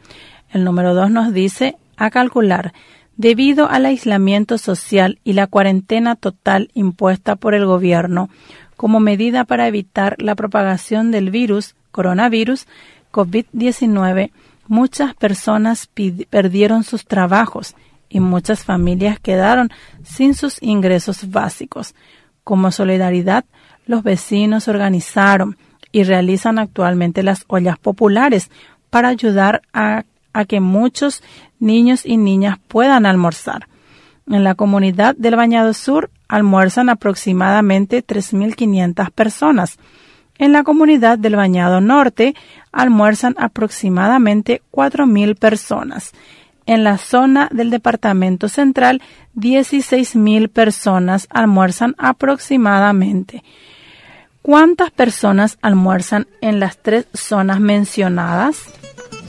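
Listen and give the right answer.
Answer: 23.500 personas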